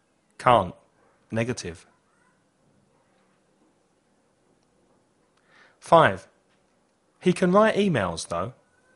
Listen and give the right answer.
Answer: Can. Positive.